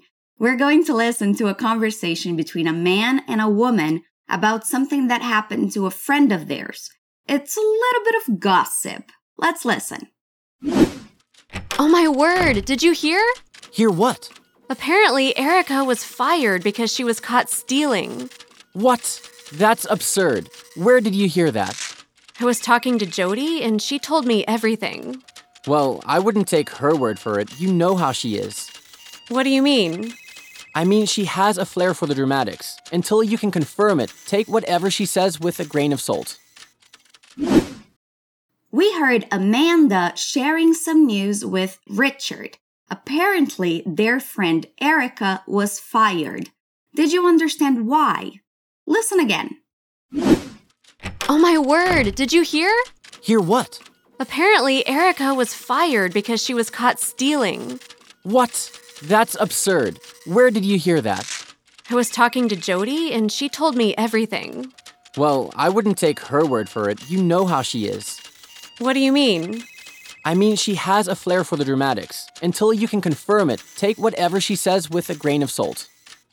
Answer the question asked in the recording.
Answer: It seems she was fired because she was stealing.